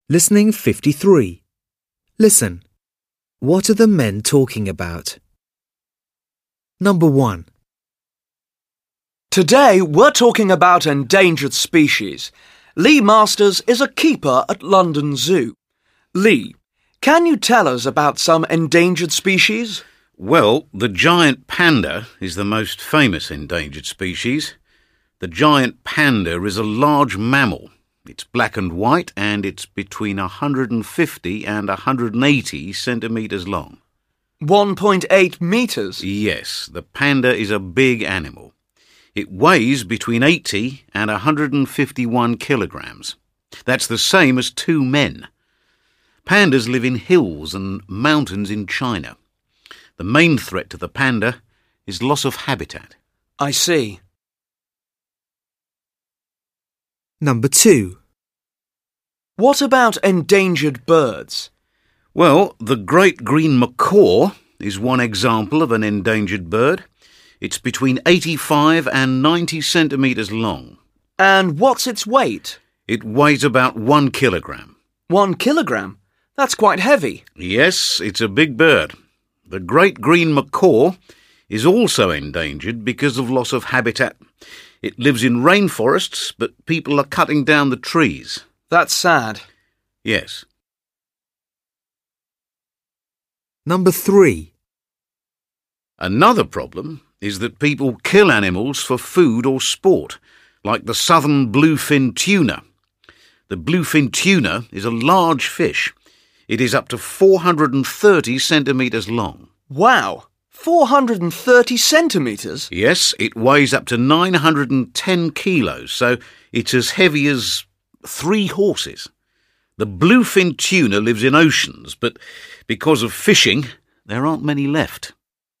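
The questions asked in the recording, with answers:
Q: What are the men talking about?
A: Endangered species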